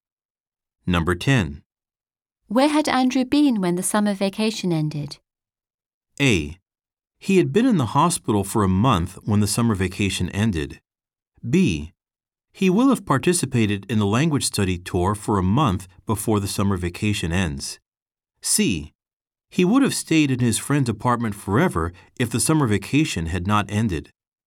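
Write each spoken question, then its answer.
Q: Where had Andrew been when the summer vacation ended?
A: A: He had been in the hospital for a month when the summer vacation ended.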